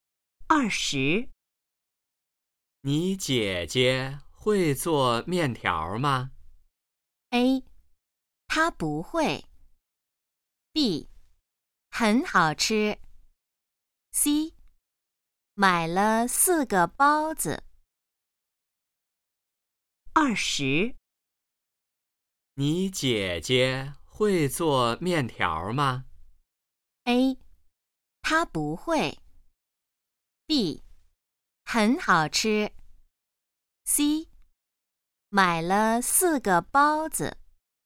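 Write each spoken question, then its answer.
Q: 你姐姐会做面条吗?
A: A: 她不会。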